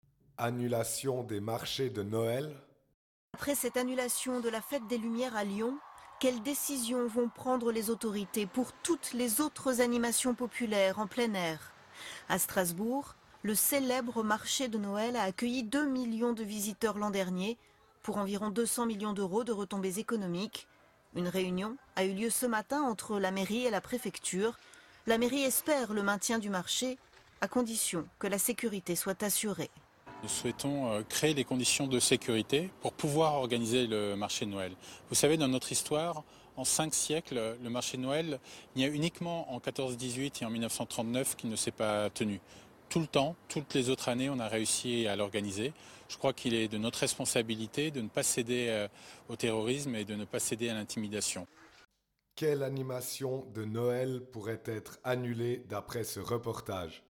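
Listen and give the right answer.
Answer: Le marché de Noël de Strasbourg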